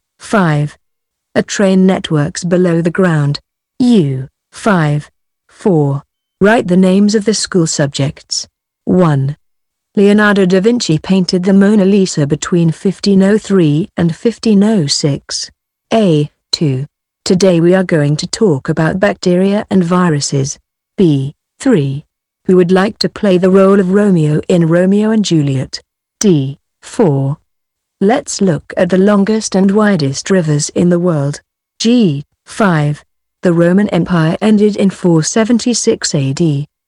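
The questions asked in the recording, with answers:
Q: Leonardo da Vinci painted the Mona Lisa between 1503 and 1506.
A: art

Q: Today we are going to talk about bacteria and viruses.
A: biology

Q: Who would like to play the role of Romeo in Romeo and Juliet?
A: drama

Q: Let's look at the longest and widest rivers in the world.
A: geography

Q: The Roman Empire ended in 476 AD.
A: history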